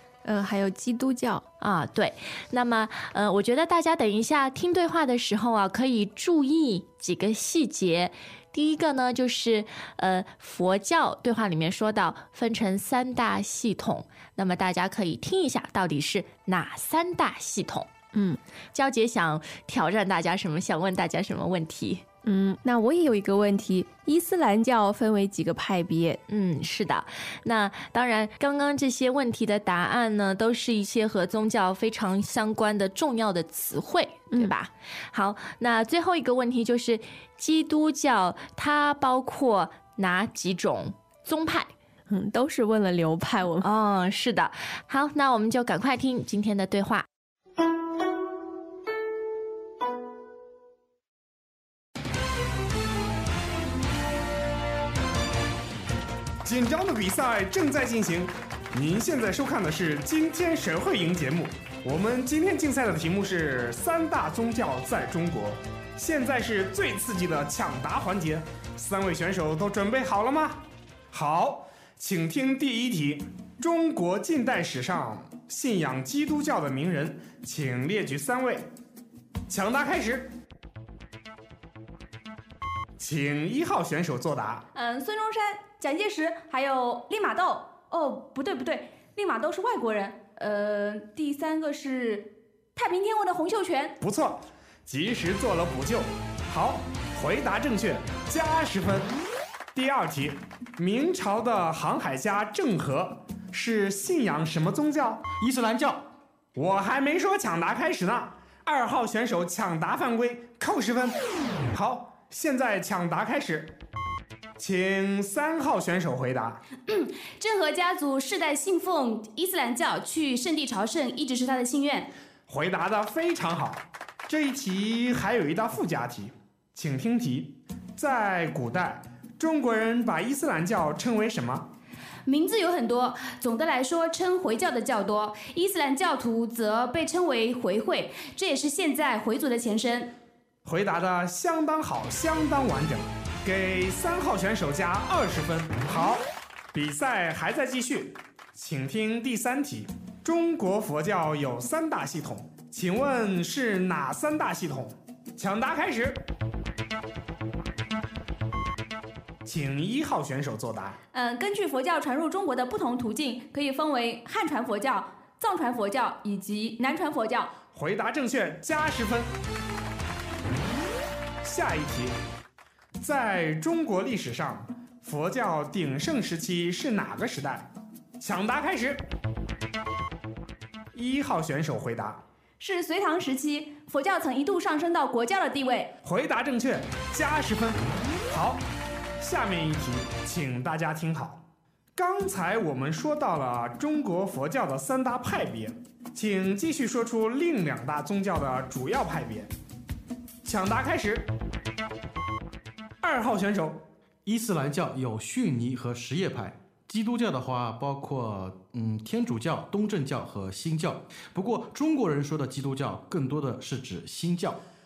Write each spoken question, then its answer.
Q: 第一个呢,就是佛教对话里面说到分成三大系统,那么大家可以听一下到底是哪三大系统。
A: 是汉传佛教、藏传佛教和南传佛教。

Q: 伊斯兰教分为几个派别?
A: 它有逊尼和什叶派。

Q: 那最后一个问题就是基督教它包括哪几种宗派?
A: 是天主教、东正教和新教。